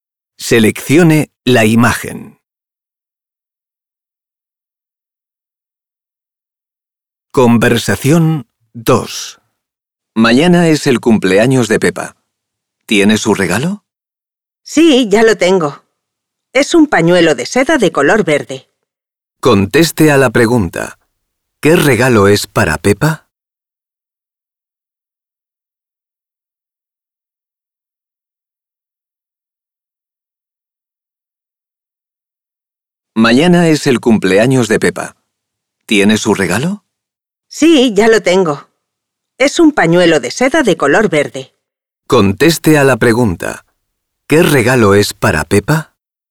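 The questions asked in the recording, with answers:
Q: ¿Qué regalo es para Pepa?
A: Un pañuelo de seda verde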